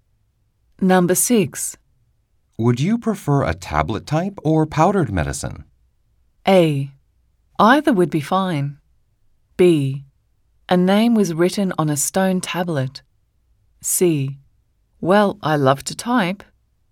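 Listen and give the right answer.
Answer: A: Either would be fine.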